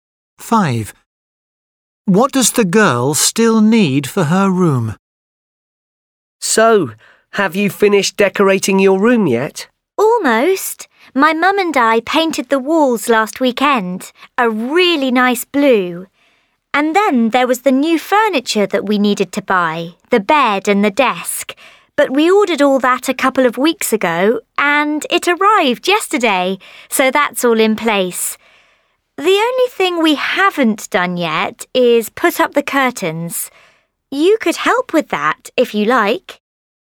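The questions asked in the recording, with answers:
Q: What does the girl still need for her room?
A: curtains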